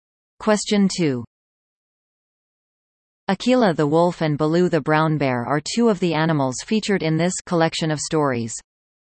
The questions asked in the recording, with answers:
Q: Akela the Wolf and Baloo the Brown Bear are two of the animals featured in this collection of stories.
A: The answer? The Jungle Book.